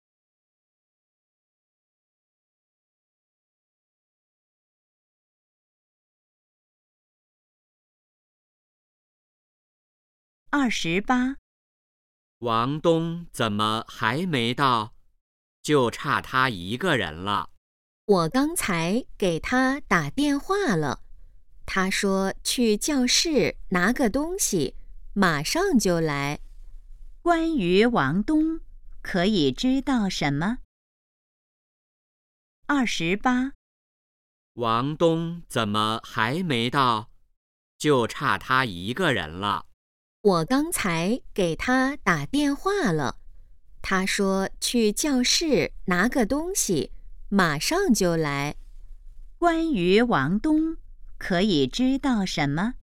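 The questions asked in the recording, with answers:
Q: 关于王东,可以知道什么?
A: 他去教室拿东西了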